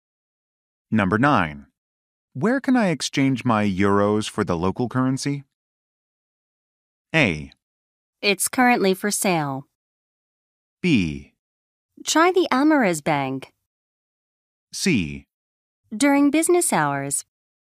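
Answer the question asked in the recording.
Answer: B: Try the Amaris Bank.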